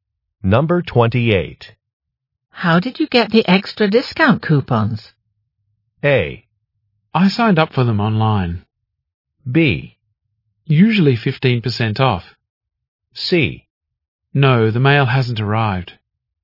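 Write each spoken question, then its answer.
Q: How did you get the extra discount coupons?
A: A: I signed up for them online.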